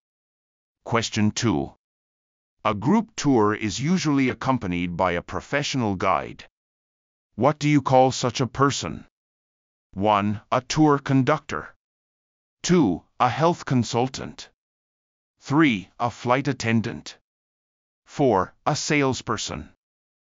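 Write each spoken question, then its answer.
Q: What do you call such a person?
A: 1: A tour conductor.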